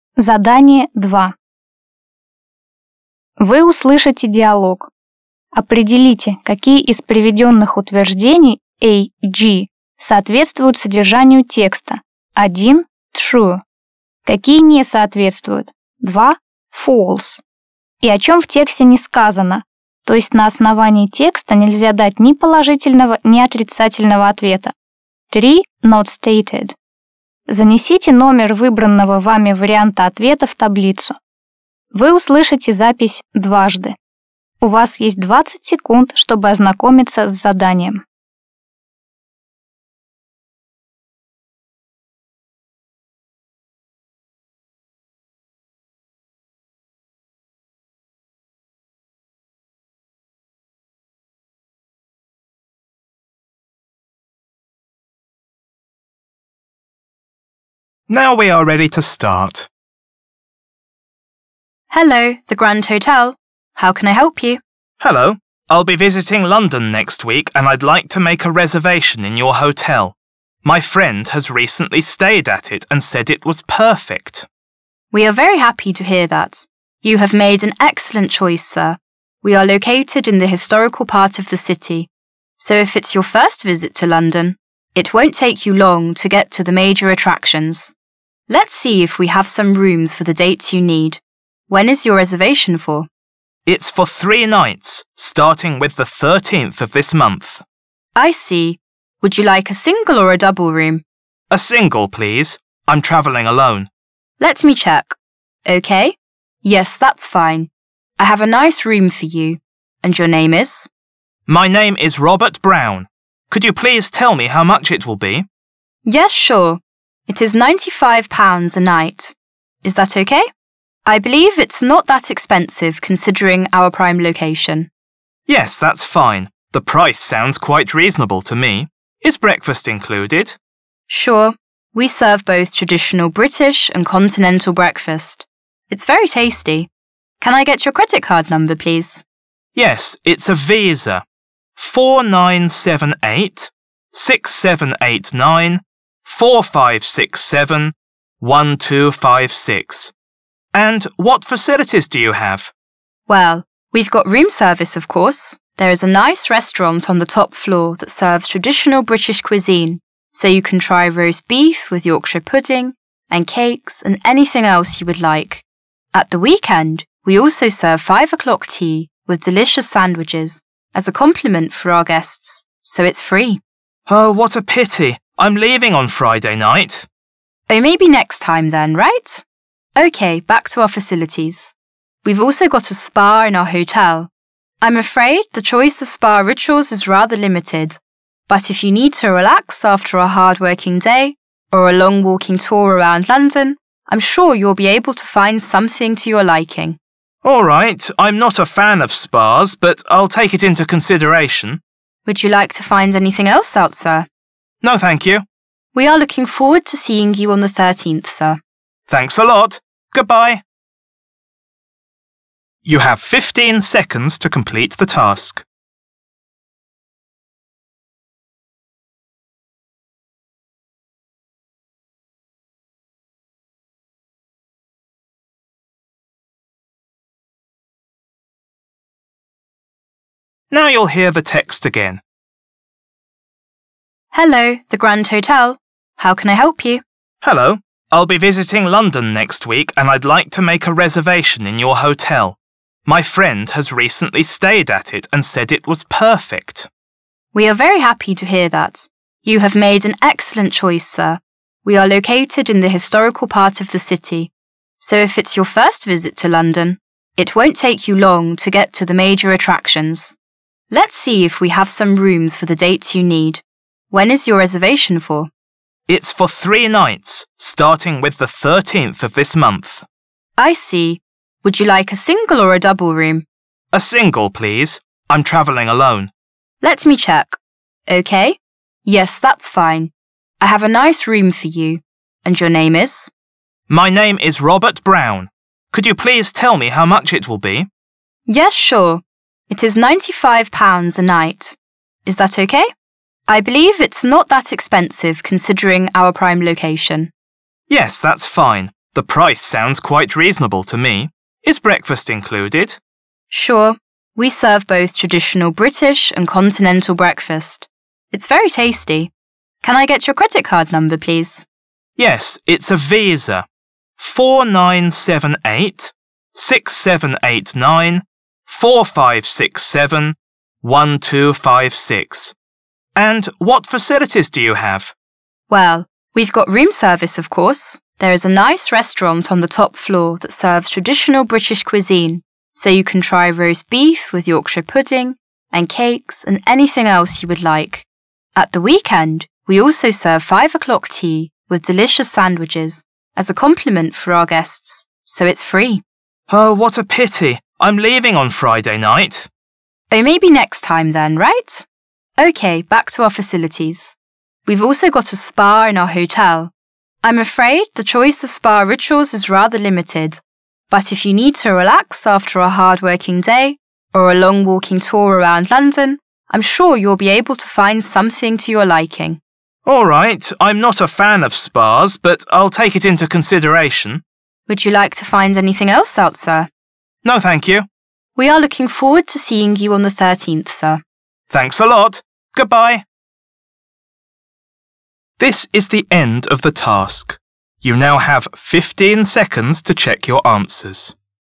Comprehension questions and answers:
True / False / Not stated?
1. The client has followed his friend's recommendation.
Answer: True

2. The client has never been to London before.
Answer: Not stated

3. The client is single.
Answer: Not stated

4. The client is surprised at the high price of the room.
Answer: False

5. One cannot try British food at the hotel's restaurant.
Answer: False

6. The 5 o'clock tea weekend service is very expensive.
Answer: False

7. The client doesn't like spas very much.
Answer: True

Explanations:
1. «I'll be visiting London next week and I'd like to make a reservation in your hotel. My friend has recently stayed at it and said it was perfect.»
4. «Yes, that's fine. The price sounds quite reasonable to me.»
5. «Sure, we serve those traditional British and continental breakfast.»
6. «At the weekend we also serve five o'clock tea with delicious sandwiches as a compliment for our guests, so it's free.»
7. «I'm not a fan of spas but I'll take it into consideration.»

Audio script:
Receptionist: Hello, the Grand Hotel. How can I help you?
Client: Hello. I'll be visiting London next week and I'd like to make a reservation in your hotel. My friend has recently stayed at it and said it was perfect.
Receptionist: We are very happy to hear that. You have made an excellent choice, sir. We are located in the historical part of the city, so if it's your first visit to London, it won't take you long to get to the major attractions. Let's see if we have some rooms for the dates you need. When is your reservation for?
Client: It's for three nights, starting with the 13th of this month.
Receptionist: I see. Would you like a single or a double room?
Client: A single, please. I'm travelling alone.
Receptionist: Let me check. Yes, that's fine. I have a nice room for you. And your name is?
Client: My name is Robert Brown. Could you please tell me how much it will be?
Receptionist: Yes, sure. It is £95 a night. Is that OK? I believe it's not that expensive considering our prime location.
Client: Yes, that's fine. The price sounds quite reasonable to me. Is breakfast included?
Receptionist: Sure. We serve both traditional British and continental breakfast. It's very tasty. Can I get your credit card number, please?
Client: Yes, it's a visa. 4978 6789 4567 1256. And what facilities do you have?
Receptionist: Well, we've got room service, of course. There is a nice restaurant on the top floor that serves traditional British cuisine, so you can try roast beef with Yorkshire pudding and cakes and anything else you would like. At the weekend, we also serve five o'clock tea with delicious sandwiches as a compliment for our guests, so it's free.
Client: Oh, what a pity! I'm leaving on Friday night.
Receptionist: Oh, maybe next time then, right? OK, back to our facilities. We've also got a spa in our hotel. I'm afraid the choice of spa rituals is rather limited, but if you need to relax after a hard working day, or a long walking tour around London, I'm sure you'll be able to find something to your liking.
Client: Alright, I'm not a fan of spas, but I'll take it into consideration.
Receptionist: Would you like to find anything else out there?
Client: No, thank you.
Receptionist: We are looking forward to seeing you on the 13th, sir.
Client: Thanks a lot. Goodbye.